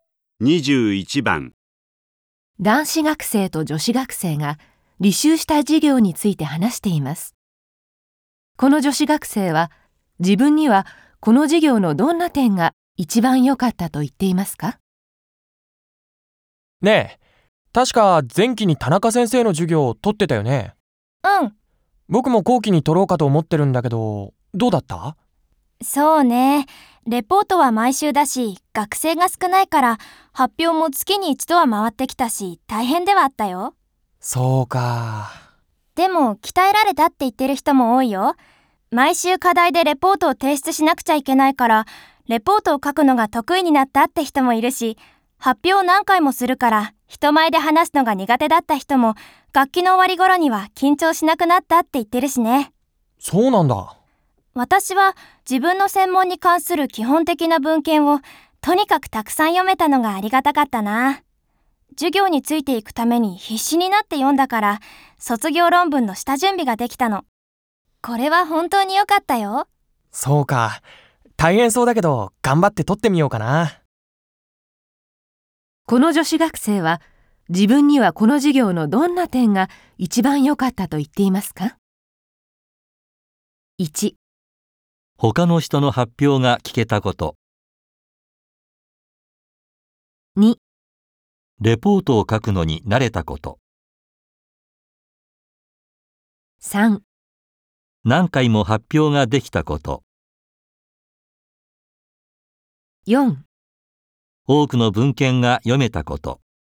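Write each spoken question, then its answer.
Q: この女子学生は自分にはこの授業のどんな点が一番良かったと言っていますか?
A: 4: 多くの文献が読めたこと。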